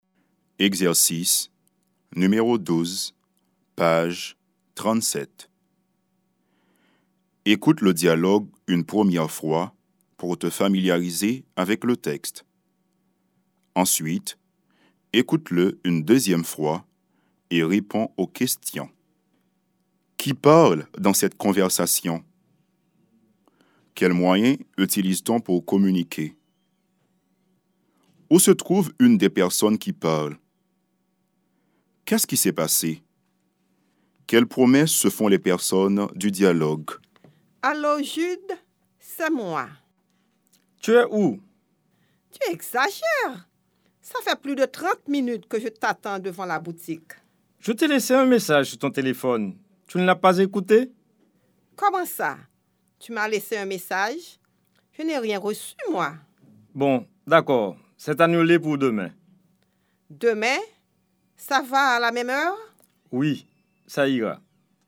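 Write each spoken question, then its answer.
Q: Quels moyens utilise-t-on pour communiquer?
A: Le téléphone (appel et message)

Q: Où se trouve une des personnes qui parle?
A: Devant la boutique

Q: Quelles promesses se font les personnes du dialogue?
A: Se retrouver demain à la même heure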